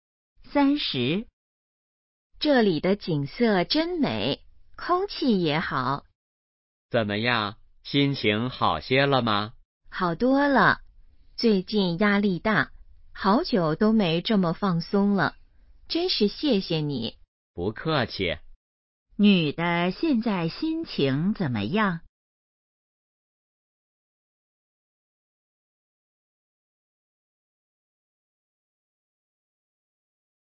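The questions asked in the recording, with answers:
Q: 女的现在心情怎么样?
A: 好多了,很放松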